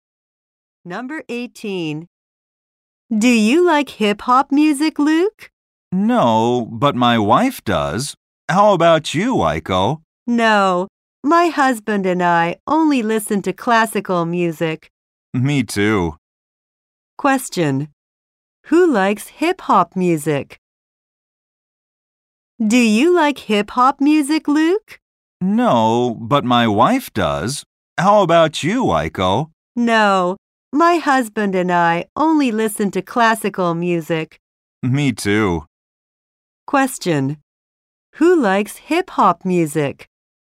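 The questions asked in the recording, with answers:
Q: Who likes hip-hop music?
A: Luke's wife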